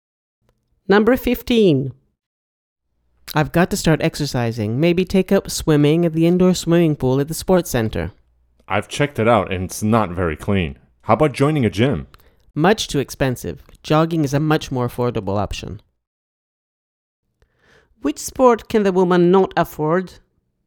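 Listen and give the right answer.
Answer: joining a gym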